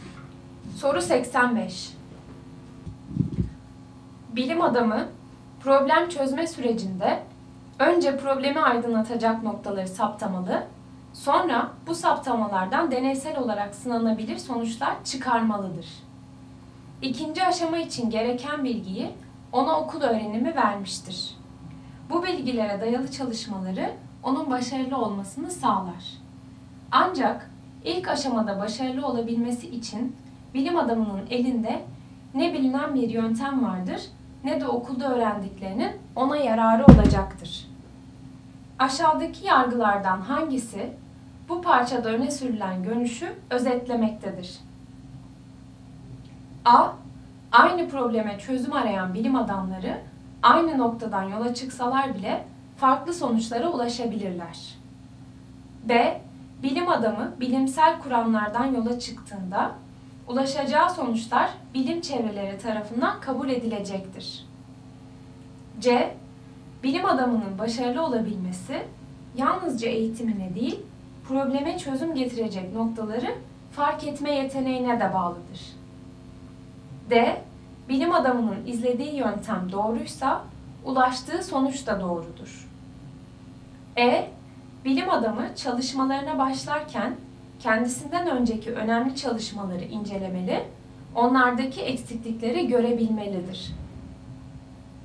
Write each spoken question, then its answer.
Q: Aşağıdaki yargılardan hangisi bu parçada öne sürülen görüşü özetlemektedir?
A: Doğru cevap C. Bilim adamının başarılı olabilmesi yalnızca eğitimine değil, probleme çözüm getirecek noktaları fark etme yeteneğine de bağlıdır.